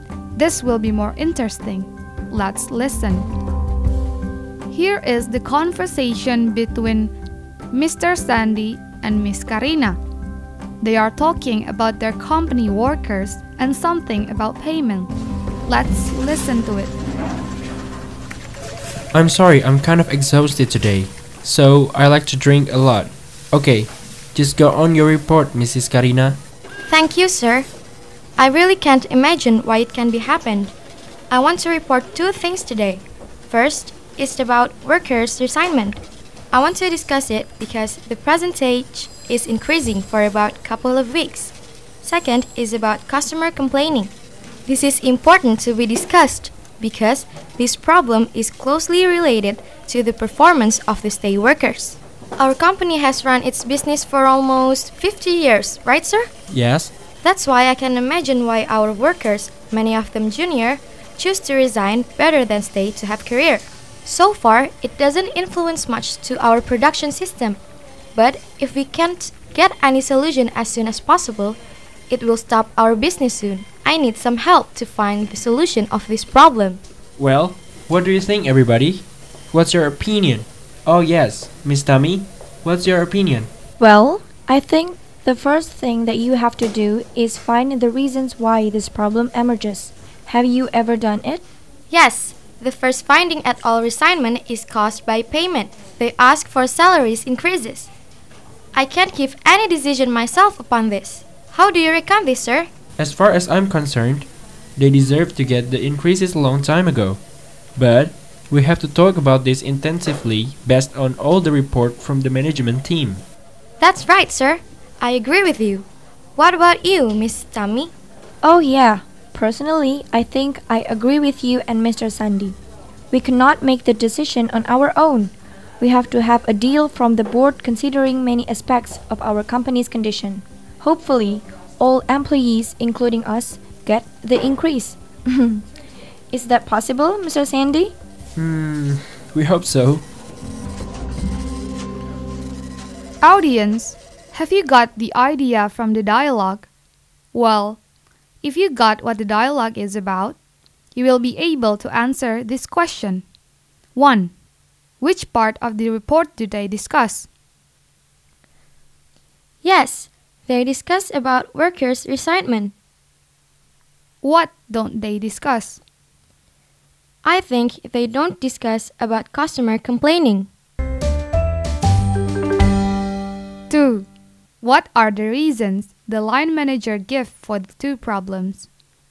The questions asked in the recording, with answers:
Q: Which part of the report do they discuss?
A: Yes, they discuss about workers' resentment.

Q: What are the reasons the line manager gives for the two problems.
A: The reason of the resignment workers is possibly because of the payment or salary is low, while for the customer complaining is possibly because of the low performance of the stay workers.